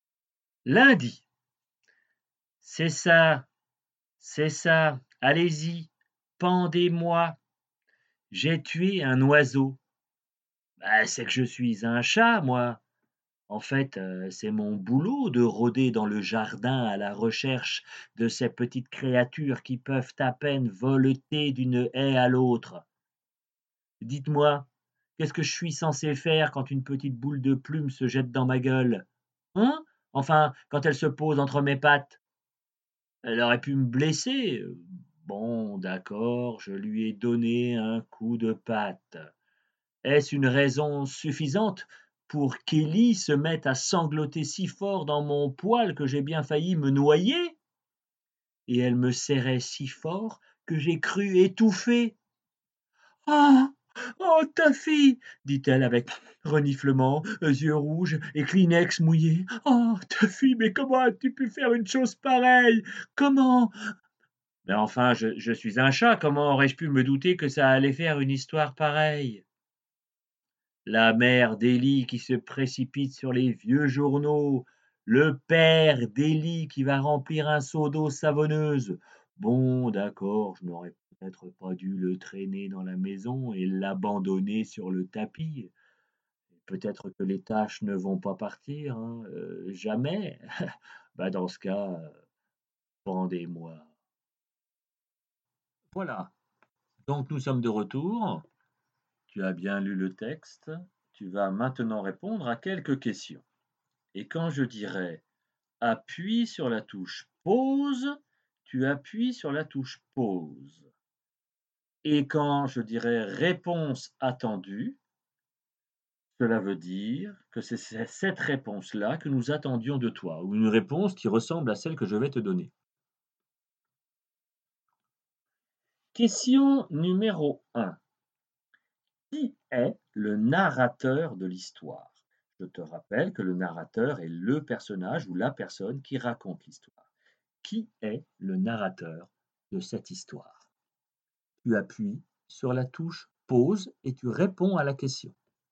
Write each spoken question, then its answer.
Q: Qui est le narrateur de l'histoire?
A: le narrateur de l'histoire est un chat.